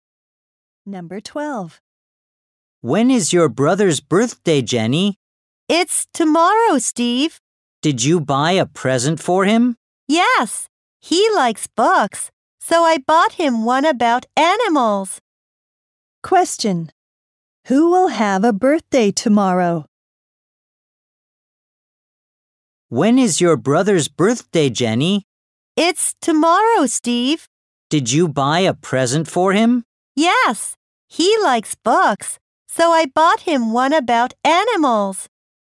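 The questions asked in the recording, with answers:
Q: Question. Who will have a birthday tomorrow?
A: Jenny's brother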